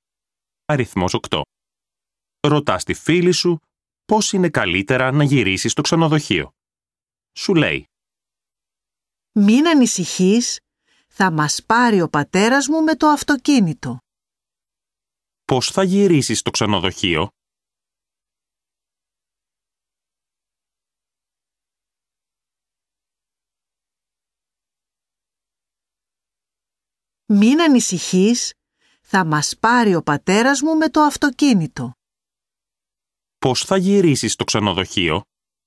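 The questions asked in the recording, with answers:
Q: Πώς θα γυρίσεις στο ξενοδοχείο?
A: με το αυτοκίνητο του πατέρα της φίλης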